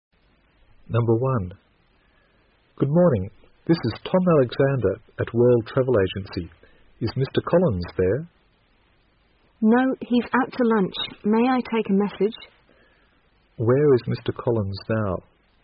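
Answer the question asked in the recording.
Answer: Out to lunch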